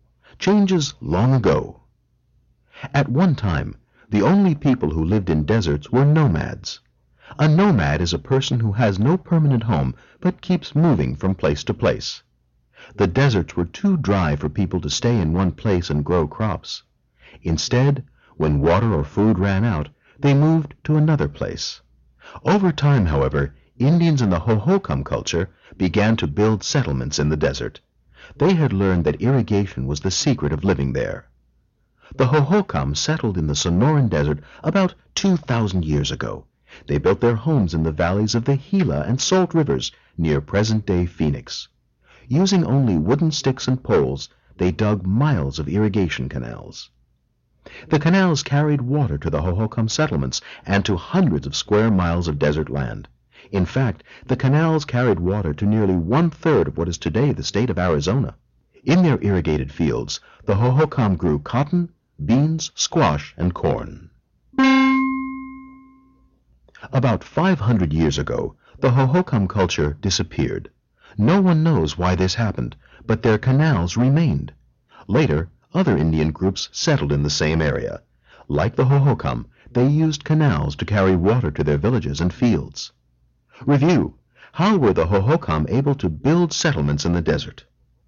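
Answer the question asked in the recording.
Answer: By using irrigation: they dug miles of canals to carry water to their settlements and fields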